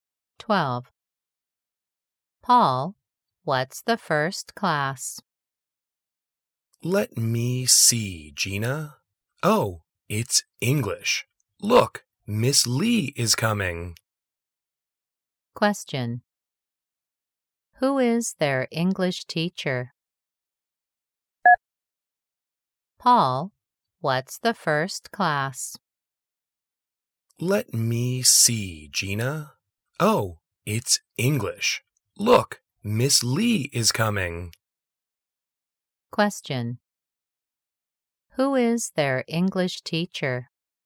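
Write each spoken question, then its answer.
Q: Who is their English teacher?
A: Miss Lee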